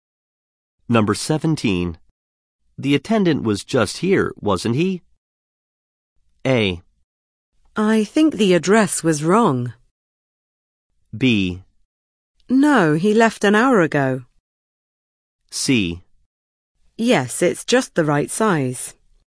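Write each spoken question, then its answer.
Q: The attendant was just here, wasn't he?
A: B: No, he left an hour ago.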